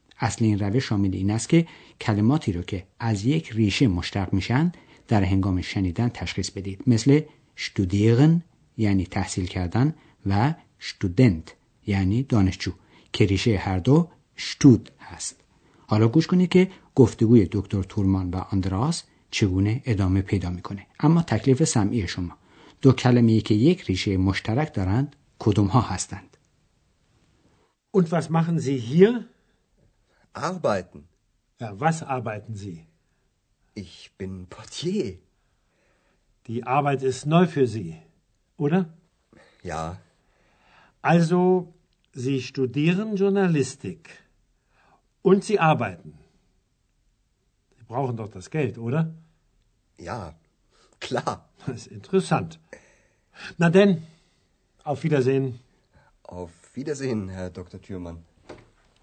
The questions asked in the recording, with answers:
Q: تکلیف سمعی شما دو کلمه‌ای که یک ریشه مشترک دارند کدوم ها هستند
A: دو کلمه مورد نظر ما که ریشه مشترک دارند کار کردن و کار بود که ریشه هر دو اغباید است.